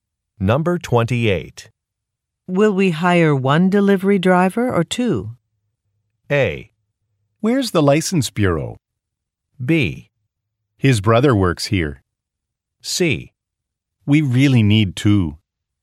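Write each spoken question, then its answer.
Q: Will we hire one delivery driver or two?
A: C: We really need two.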